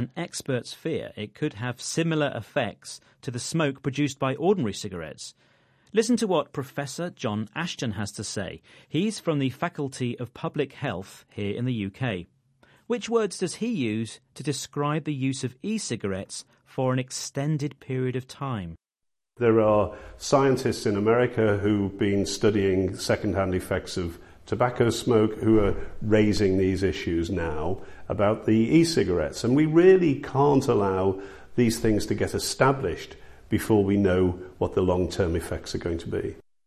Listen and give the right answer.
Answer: He talks about long-term effects